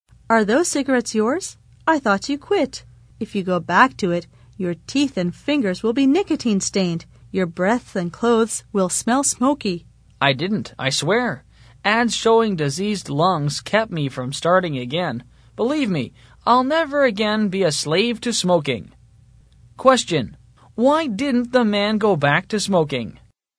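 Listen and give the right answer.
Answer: Ads showing diseased lungs kept him from starting again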